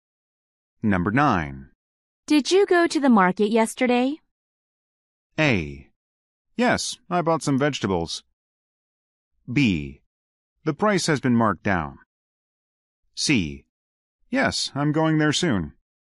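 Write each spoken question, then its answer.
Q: Did you go to the market yesterday?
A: A: Yes, I bought some vegetables.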